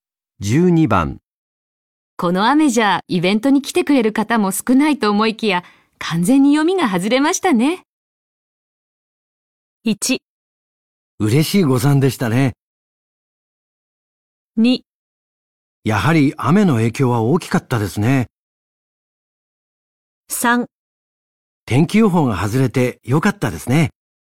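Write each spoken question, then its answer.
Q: この雨じゃイベントに来てくれる方も少ないと思いきや完全に読みが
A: 1: 嬉しい誤算でしたね。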